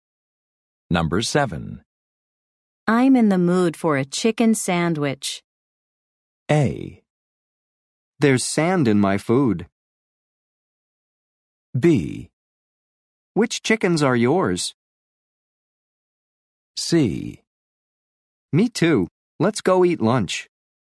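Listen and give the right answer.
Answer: C: Me too. Let's go eat lunch.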